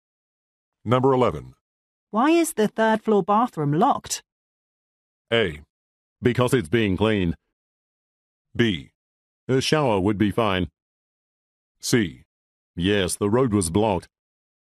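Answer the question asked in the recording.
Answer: A: Because it's being cleaned.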